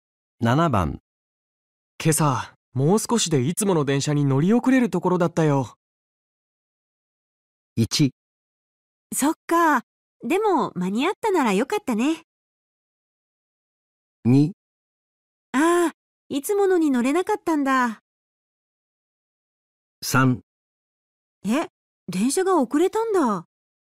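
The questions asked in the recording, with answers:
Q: 今朝もう少しでいつもの電車に乗り遅れるところだったよ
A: 1: そっかでも間に合ったならよかったね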